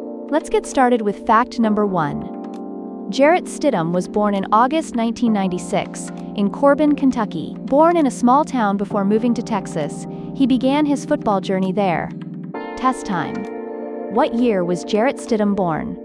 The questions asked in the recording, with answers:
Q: What year was Jarrett Stidham born?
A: Correct answer, 1996.